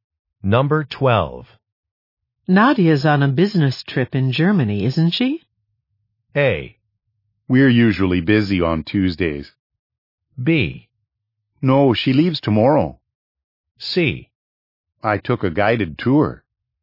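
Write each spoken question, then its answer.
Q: Nadia's on a business trip in Germany, isn't she?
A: B: No, she leaves tomorrow.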